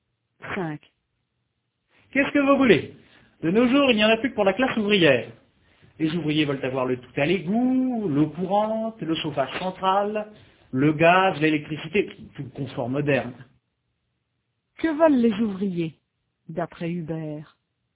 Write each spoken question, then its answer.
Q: Que veulent les ouvriers, d'après Hubert?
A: Ils veulent tout le confort moderne, le tout à l'égout, l'eau courante, le chauffage central, le gaz, l'électricité.